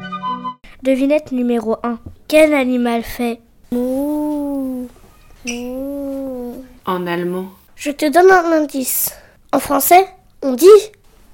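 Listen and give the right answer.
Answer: la vache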